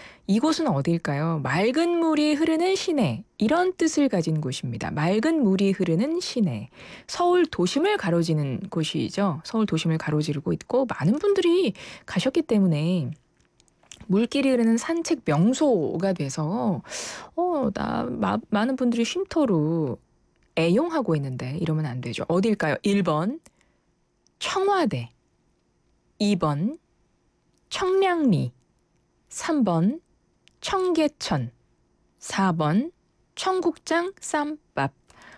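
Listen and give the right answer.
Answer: 3: 청계천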